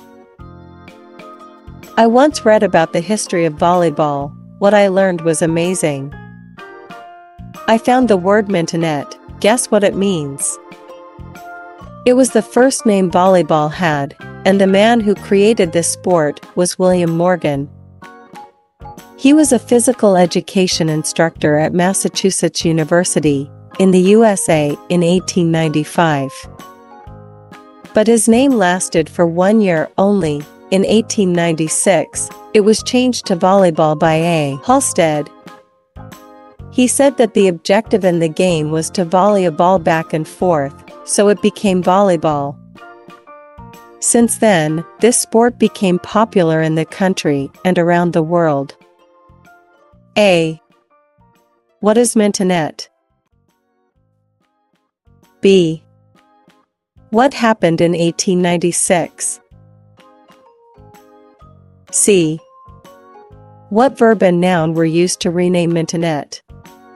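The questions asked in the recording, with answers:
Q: What is mentonette?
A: The first name of volleyball

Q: What happened in 1896?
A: The name was changed to volleyball by A. Halstead

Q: What verb and noun were used to rename mentonette?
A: Volley (verb) and ball (noun)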